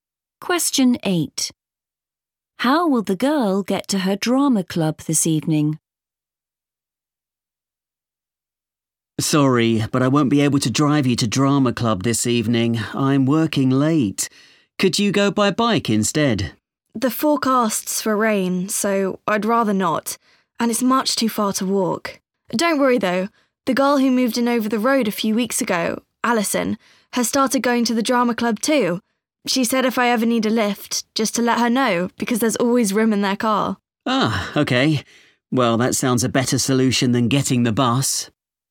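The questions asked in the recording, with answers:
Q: How will the girl get to her drama club this evening?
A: She'll get a lift in Alison's car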